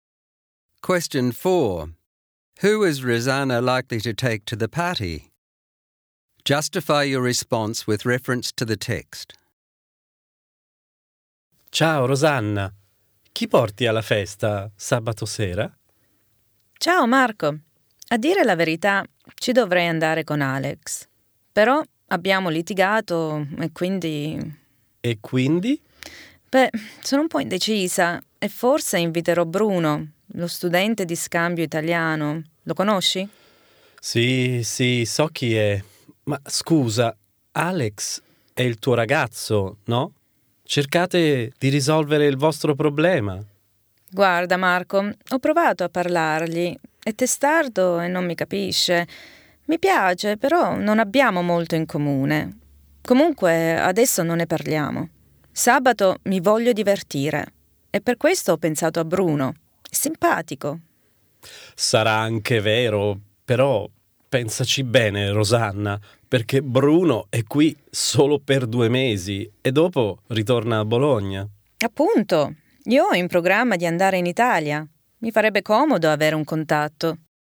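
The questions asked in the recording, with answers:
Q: Who is Rosanna likely to take to the party?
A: Bruno. She argued with Alex, who is stubborn and has little in common with her. She wants to have fun, finds Bruno nice, and wants a contact because she plans to go to Italy.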